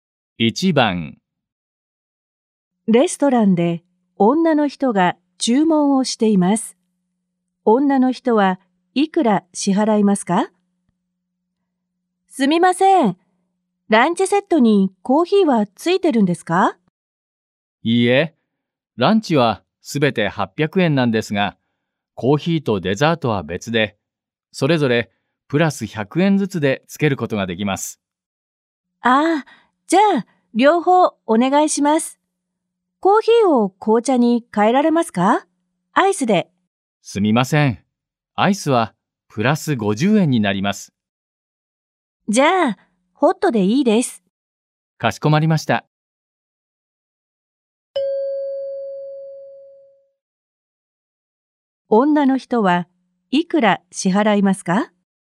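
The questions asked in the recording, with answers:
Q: 女の人はいくら支払いますか?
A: 1000円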